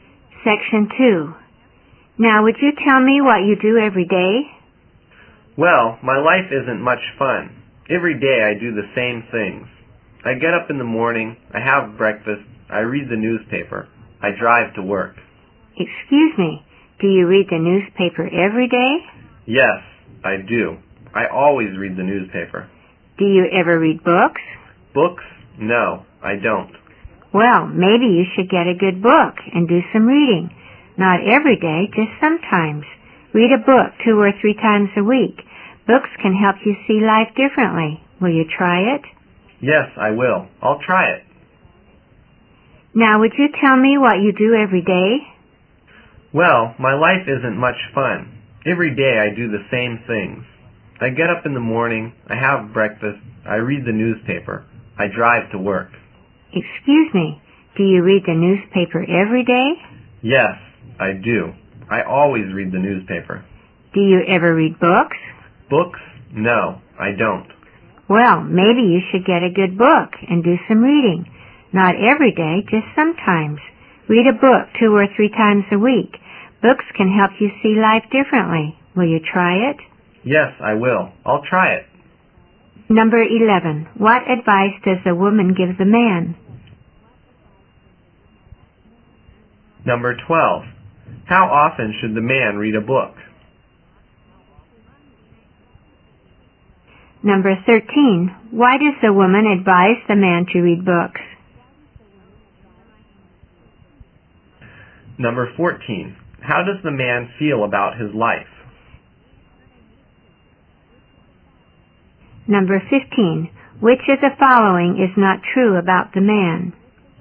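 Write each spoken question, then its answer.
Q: What advice does the woman give the man?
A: To get a good book and do some reading.

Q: How often should the man read a book?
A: 2 or 3 times a week

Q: Why does the woman advise the man to read books?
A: Books can help him see life differently.

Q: How does the man feel about his life?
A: It isn't much fun; he does the same things every day.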